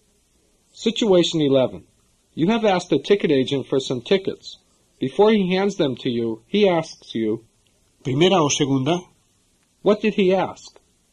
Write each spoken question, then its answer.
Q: What did he ask?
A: He asked, first or second.